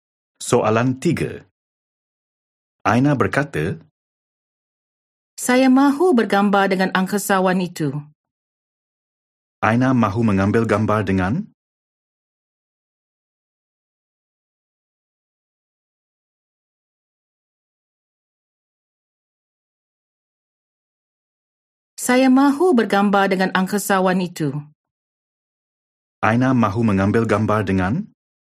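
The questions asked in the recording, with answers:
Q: Aina mahu mengambil gambar dengan?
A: Angkasawan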